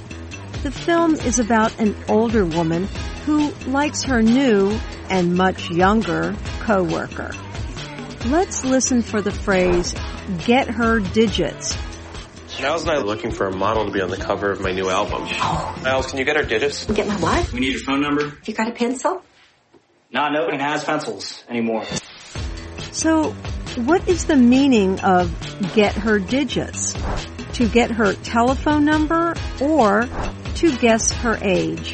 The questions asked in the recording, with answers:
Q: So, what is the meaning of get her digits?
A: Get her digits means to get her phone number.